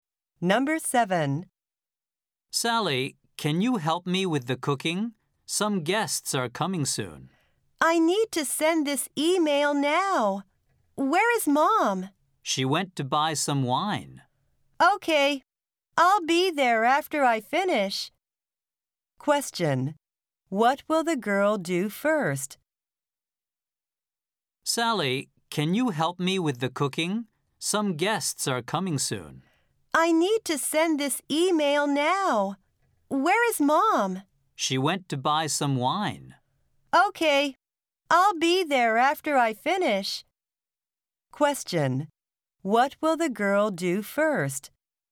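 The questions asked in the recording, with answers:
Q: What will the girl do first?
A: Send an email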